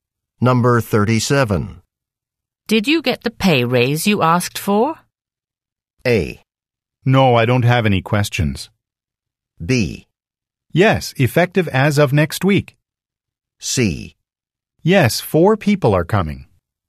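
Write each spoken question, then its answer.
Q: Did you get the pay raise you asked for?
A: B: Yes, effective as of next week.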